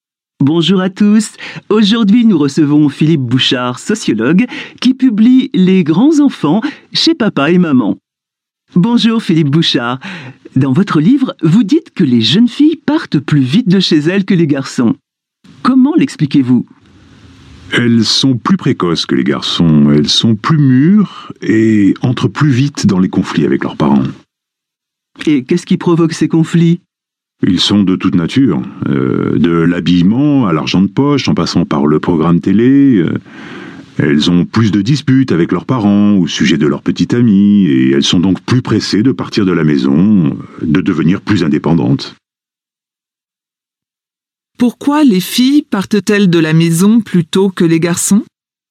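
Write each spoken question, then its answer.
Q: Pourquoi les filles partent-elles de la maison plutôt que les garçons ?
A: Elles sont plus précoces et mûres, donc elles entrent plus vite en conflit avec leurs parents et veulent devenir indépendantes.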